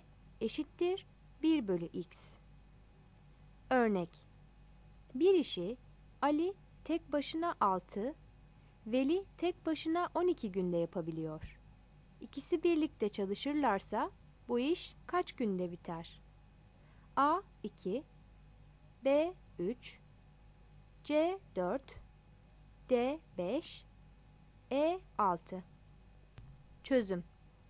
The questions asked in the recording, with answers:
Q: İkisi birlikte çalışırlarsa bu iş kaç günde biter?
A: Yanıt C'dir.